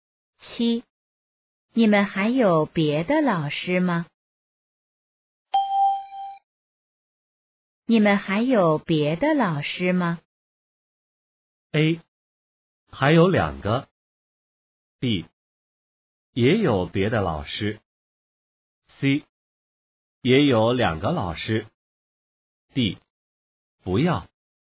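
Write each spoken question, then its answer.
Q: 你们还有别的老师吗?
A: A: 还有两个。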